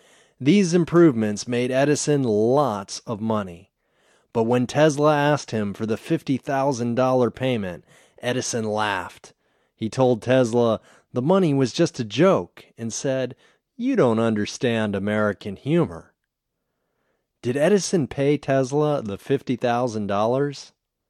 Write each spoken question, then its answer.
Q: Did Edison pay Tesla the $50,000?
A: No, Edison didn't pay Tesla the $50,000.